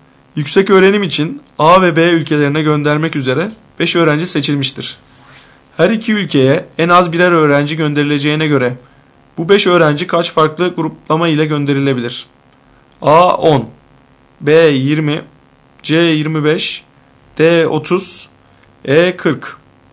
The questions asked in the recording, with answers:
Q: Her iki ülkeye en az birer öğrenci gönderileceğine göre bu 5 öğrenci kaç farklı gruplama ile gönderilebilir?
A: Doğru cevap D 30.